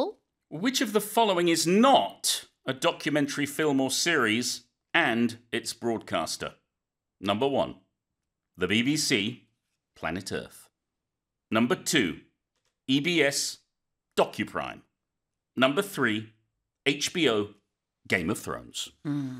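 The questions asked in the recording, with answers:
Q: Which of the following is not a documentary film or series and its broadcaster?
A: Number three: HBO, Game of Thrones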